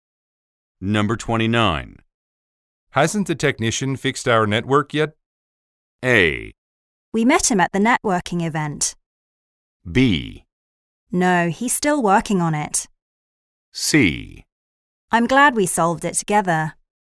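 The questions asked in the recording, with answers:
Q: Hasn't the technician fixed our network yet?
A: B: No, he's still working on it.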